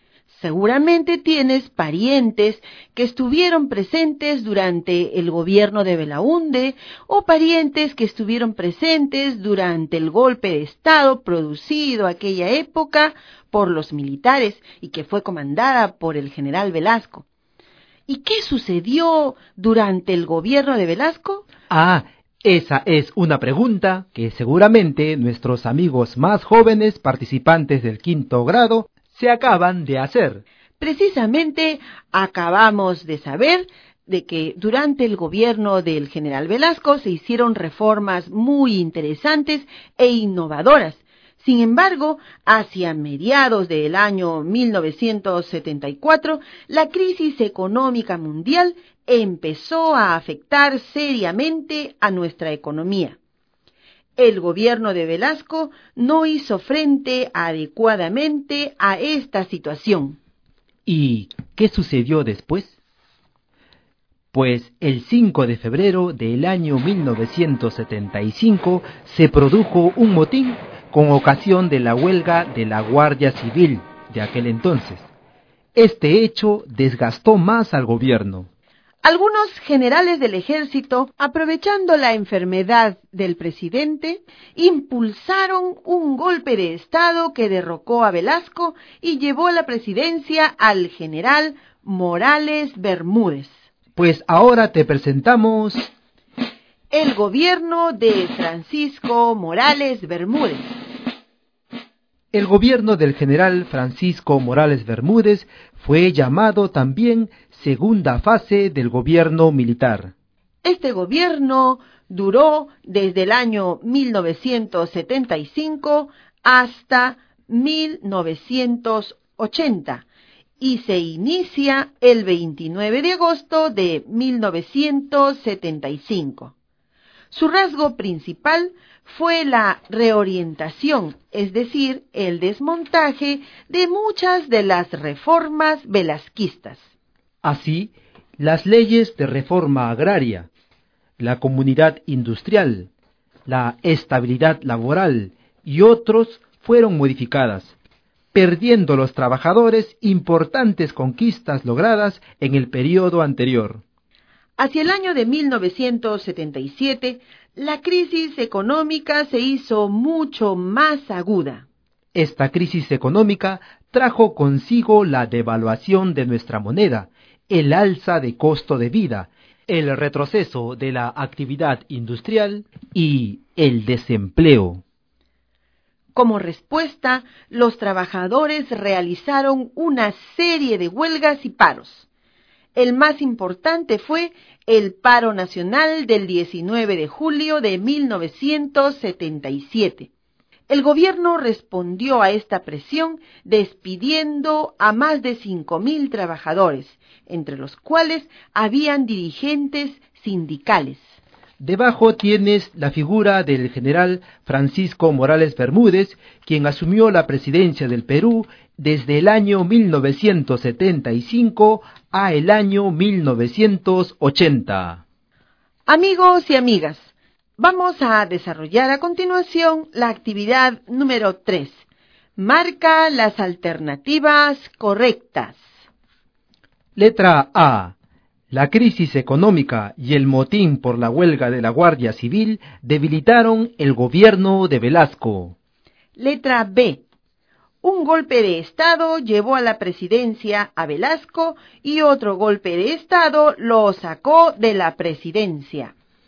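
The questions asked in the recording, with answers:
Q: La crisis económica y el motín por la huelga de la Guardia Civil debilitaron el gobierno de Velasco.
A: Correcta

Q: Un golpe de Estado llevó a la presidencia a Velasco y otro golpe de Estado lo sacó de la presidencia.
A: Correcta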